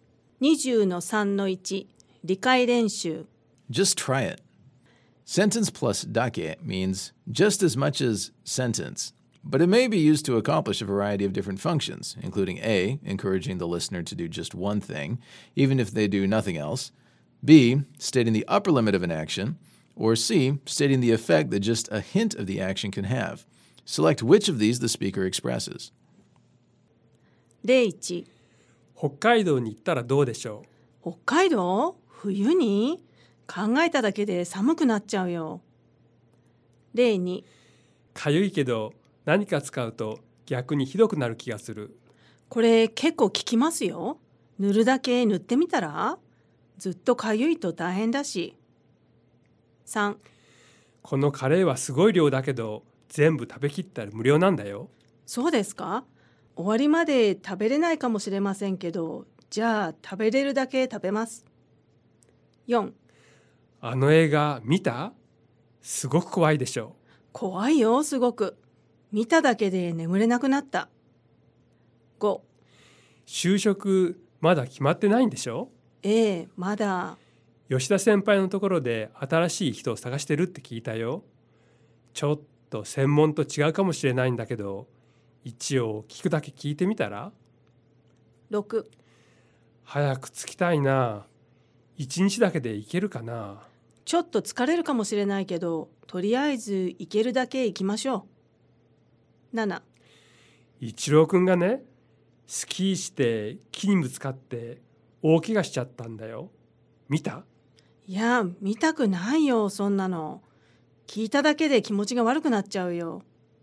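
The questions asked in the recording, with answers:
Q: Select which of these the speaker expresses.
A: B: stating the upper limit of an action

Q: Select which of these the speaker expresses.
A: C: stating the effect that just a hint of the action can have

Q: Select which of these the speaker expresses.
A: A: encouraging the listener to do just one thing, even if they do nothing else

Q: Select which of these the speaker expresses.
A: B: stating the upper limit of an action

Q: Select which of these the speaker expresses.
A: C: stating the effect that just a hint of the action can have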